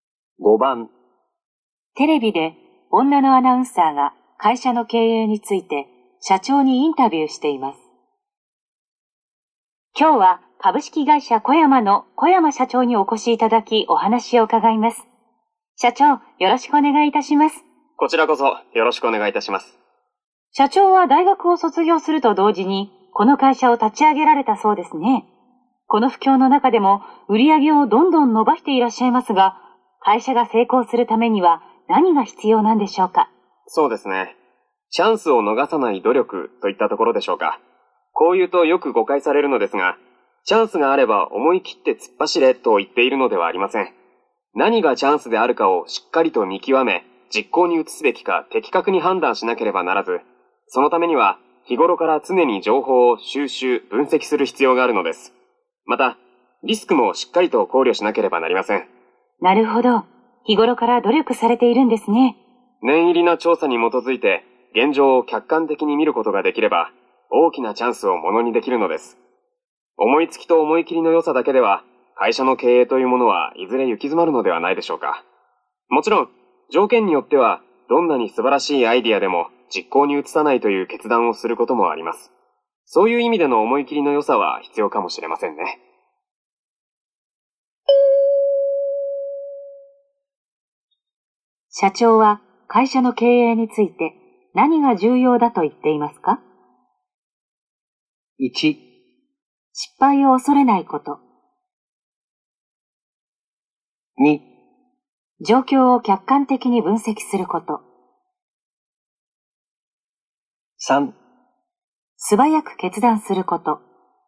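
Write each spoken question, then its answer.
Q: 社長は会社の経営について何が重要だと言っていますか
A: 2: 状況を客観的に分析すること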